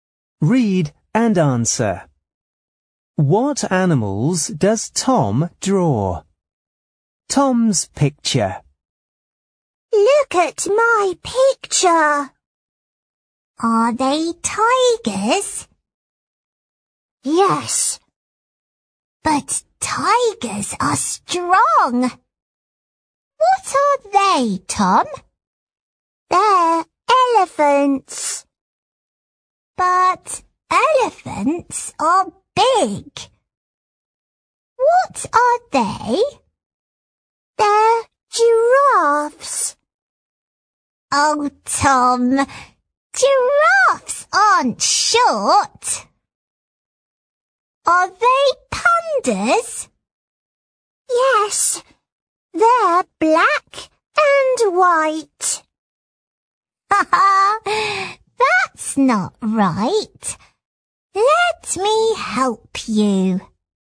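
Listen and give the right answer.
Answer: Pandas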